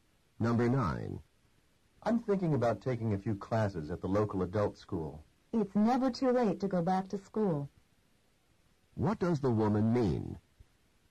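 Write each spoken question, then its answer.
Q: What does the woman mean?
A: He should take the classes; it's not too late.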